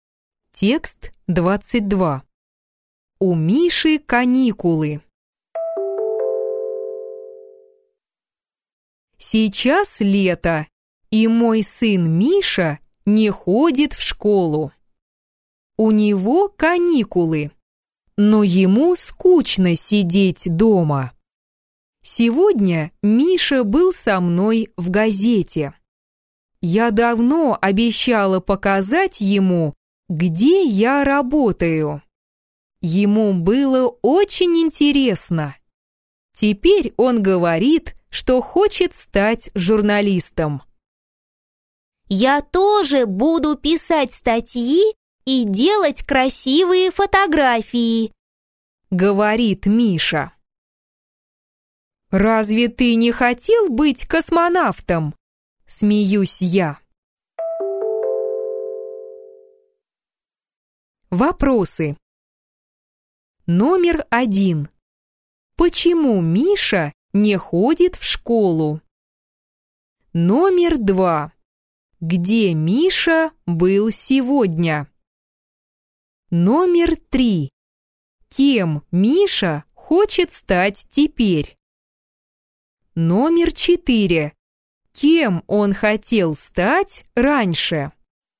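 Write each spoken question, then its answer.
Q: Почему Миша не ходит в школу?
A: Сейчас лето, у него каникулы

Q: Где Миша был сегодня?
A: В газете, на работе у мамы

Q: Кем Миша хочет стать теперь?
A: Журналистом

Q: Кем он хотел стать раньше?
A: Космонавтом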